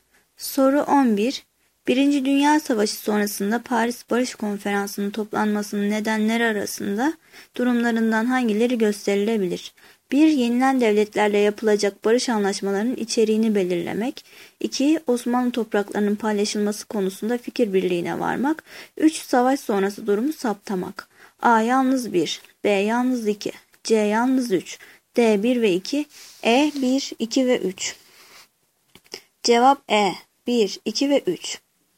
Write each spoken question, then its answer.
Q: Birinci Dünya Savaşı sonrasında Paris Barış Konferansı'nın toplanmasının nedenleri arasında durumlarından hangileri gösterilebilir?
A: Cevap E. 1, 2 ve 3.